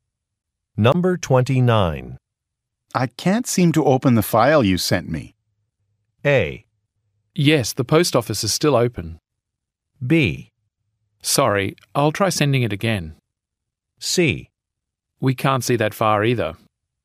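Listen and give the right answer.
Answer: B: Sorry, I'll try sending it again.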